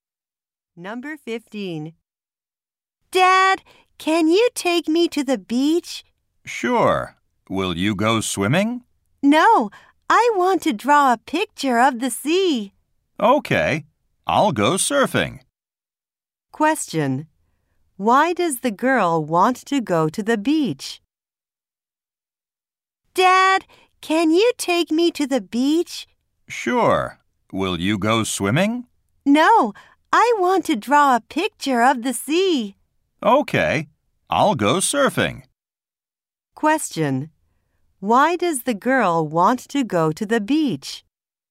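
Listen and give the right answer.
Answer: To draw a picture of the sea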